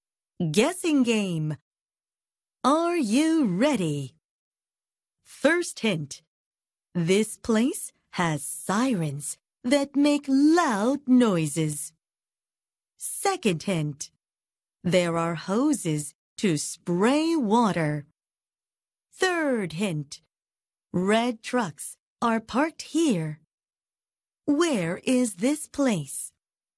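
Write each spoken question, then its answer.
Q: Where is this place?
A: A fire station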